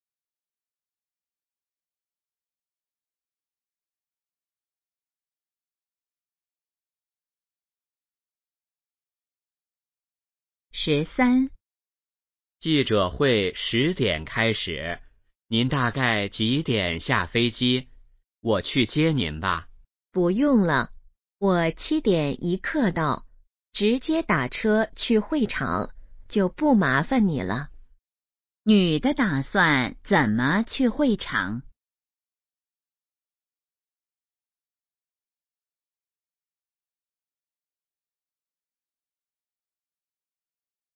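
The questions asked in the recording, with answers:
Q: 女的打算怎么去会场?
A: 打车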